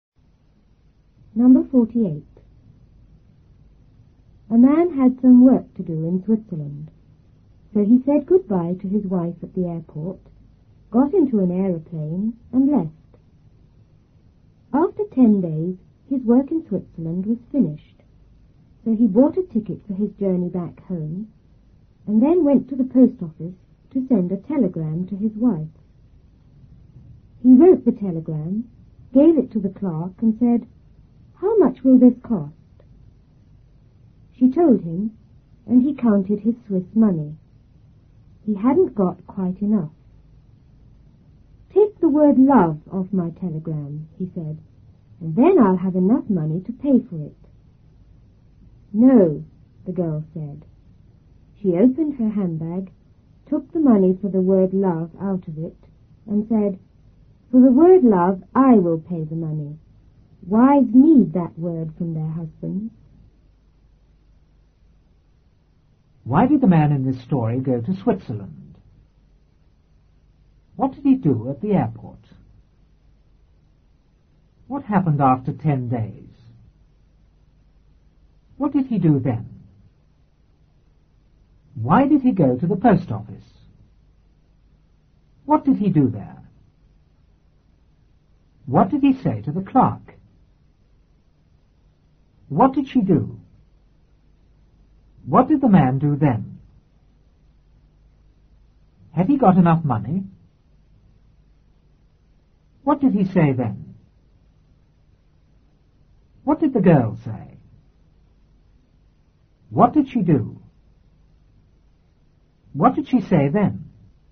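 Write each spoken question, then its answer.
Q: Why did the man in this story go to Switzerland?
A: He had some work to do there.

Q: What did he do at the airport?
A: He said goodbye to his wife and got into an aeroplane.

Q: What happened after 10 days?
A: His work in Switzerland was finished.

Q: What did he do then?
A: He bought a ticket home and went to the post office.

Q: Why did he go to the post office?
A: To send a telegram to his wife.

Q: What did he do there?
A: He wrote the telegram and gave it to the clerk.

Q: What did he say to the clerk?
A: "How much will this cost?"

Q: What did she do?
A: She told him the price.

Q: What did the man do then?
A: He counted his Swiss money.

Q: Had he got enough money?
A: No, not quite enough.

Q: What did he say then?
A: "Take the word love off my telegram, and then I'll have enough money."

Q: What did the girl say?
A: "No."

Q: What did she do?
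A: She took the money for the word love out of her handbag.

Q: What did she say then?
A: "For the word love, I will pay the money. Wives need that word from their husbands."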